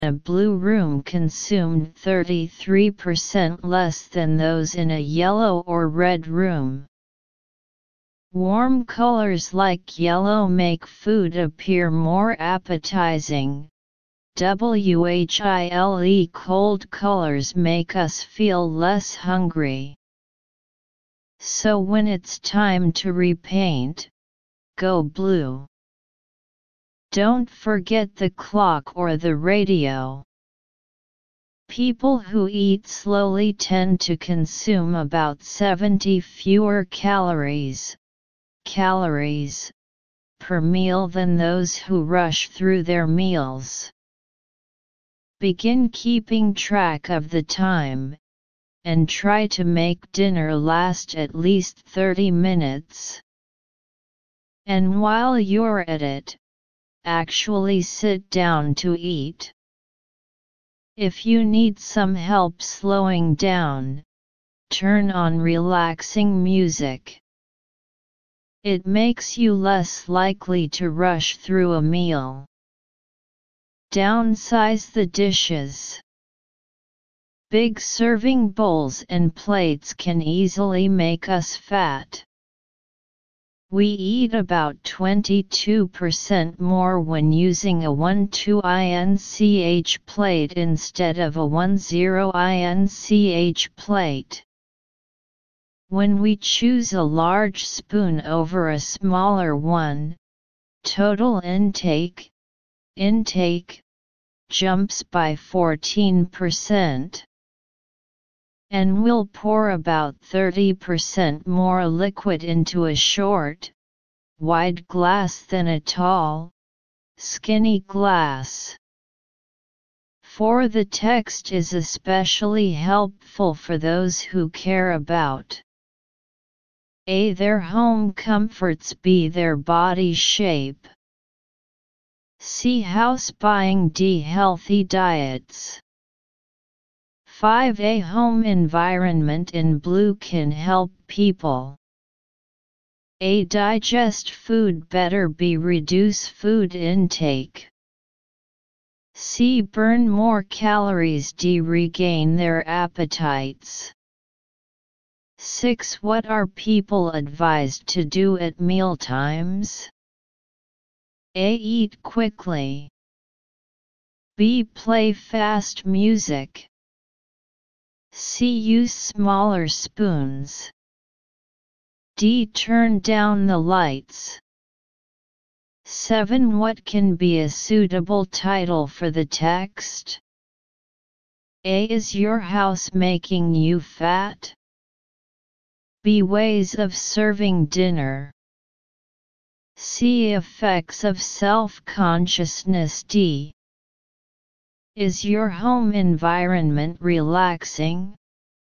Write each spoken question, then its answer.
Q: For the text is especially helpful for those who care about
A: 4. B.

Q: A home environment in blue can help people.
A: 5. B.

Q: What are people advised to do at mealtimes?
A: 6. C.

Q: What can be a suitable title for the text?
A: 7. A.